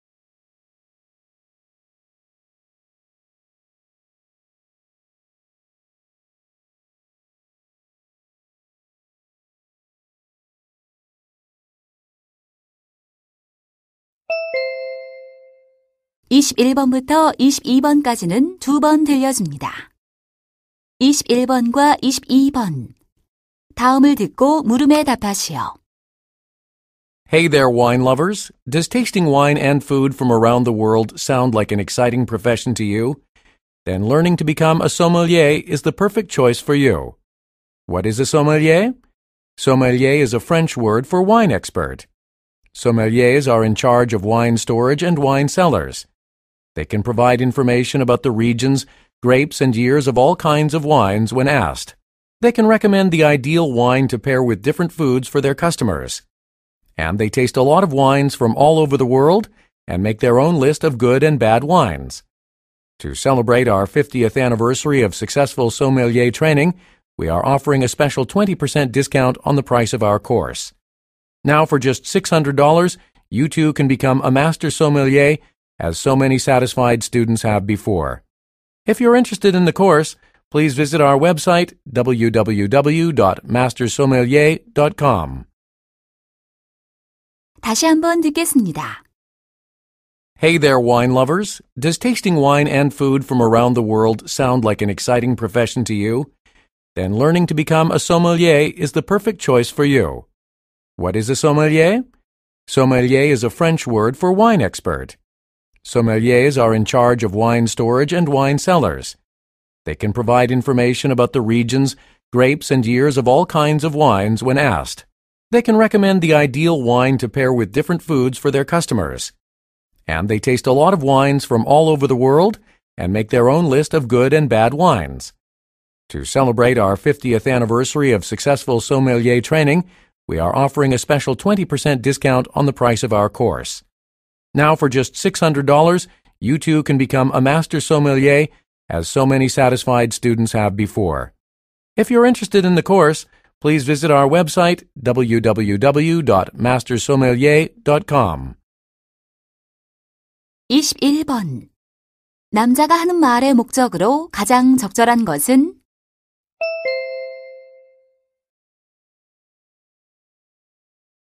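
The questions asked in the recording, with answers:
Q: 남자가 하는 말의 목적으로 가장 적절한 것은?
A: 소믈리에 양성 과정을 홍보하려고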